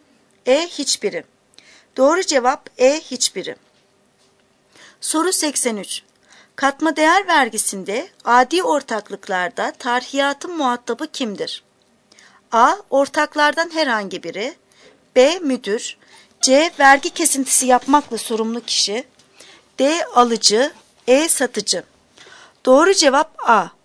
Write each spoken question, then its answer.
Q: Katma değer vergisinde adi ortaklıklarda tarhiyatın muhatabı kimdir?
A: Doğru cevap A. Ortaklardan herhangi biri.